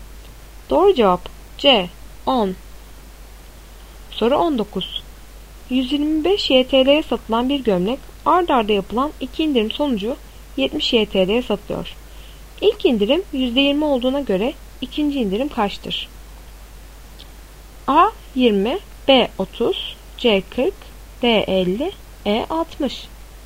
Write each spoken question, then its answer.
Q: İlk indirim %20 olduğuna göre ikinci indirim kaçtır?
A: Doğru cevap B 30.